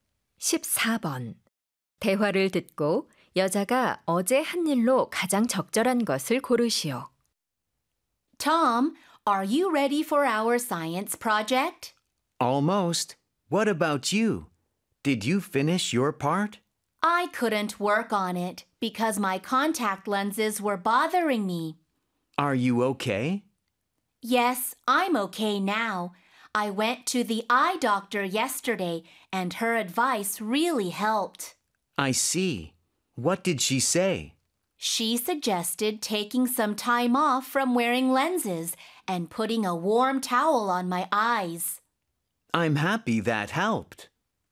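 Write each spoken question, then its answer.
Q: 대화를 듣고 여자가 어제 한 일로 가장 적절한 것을 고르시오.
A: 안과에 갔다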